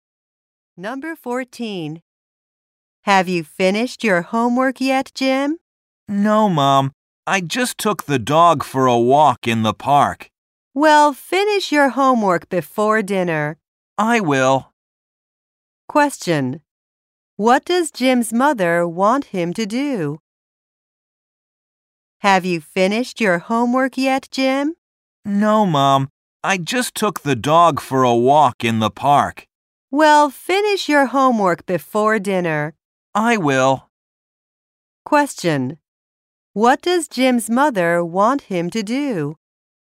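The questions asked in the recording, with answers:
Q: What does Jim's mother want him to do?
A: Finish his homework before dinner.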